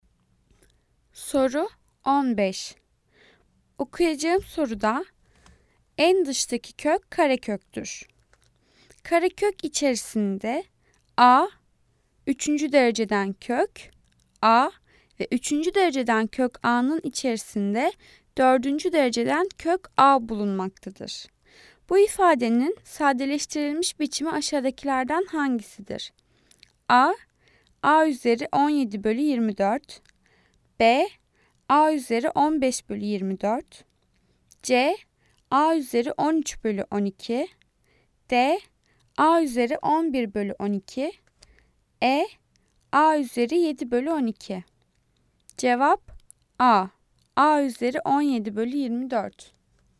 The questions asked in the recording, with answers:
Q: Bu ifadenin sadeleştirilmiş biçimi aşağıdakilerden hangisidir?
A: Cevap A. A üzeri 17 bölü 24